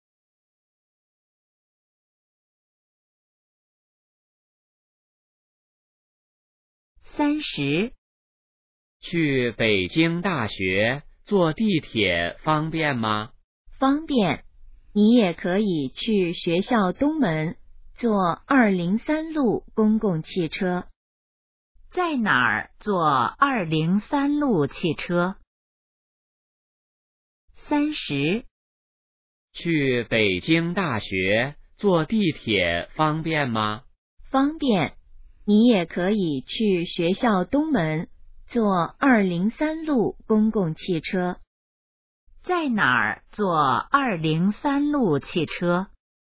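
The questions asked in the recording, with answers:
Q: 在哪儿坐203路汽车?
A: 学校东门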